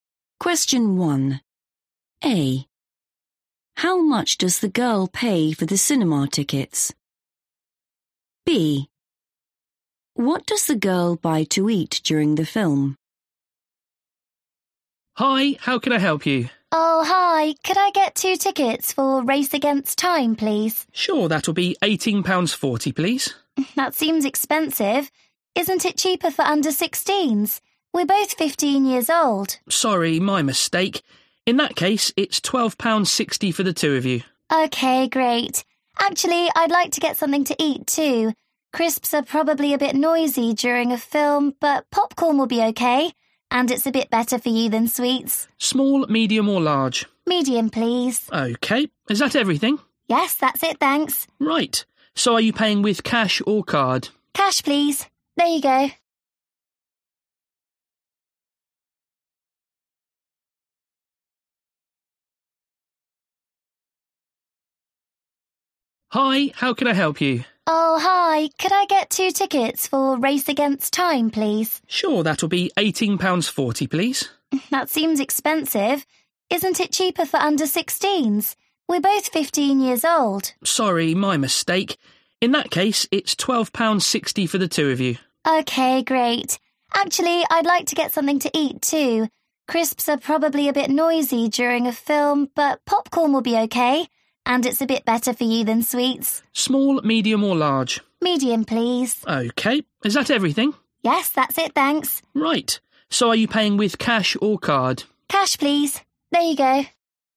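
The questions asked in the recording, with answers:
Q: How much does the girl pay for the cinema tickets?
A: £12.60

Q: What does the girl buy to eat during the film?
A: popcorn (medium)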